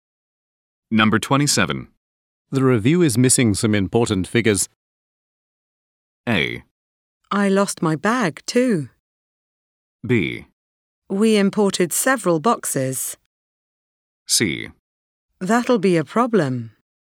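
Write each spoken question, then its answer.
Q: The review is missing some important figures.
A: C: That'll be a problem.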